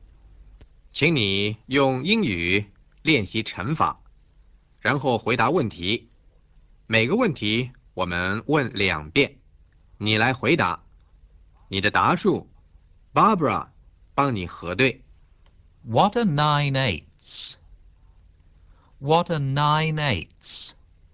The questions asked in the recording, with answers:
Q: What are 9 eighths?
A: 72。